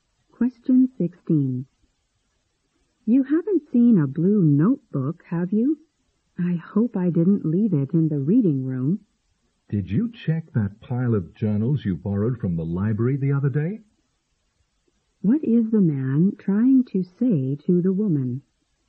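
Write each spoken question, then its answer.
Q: What is the man trying to say to the woman?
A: Her notebook may be in the pile of journals she borrowed from the library.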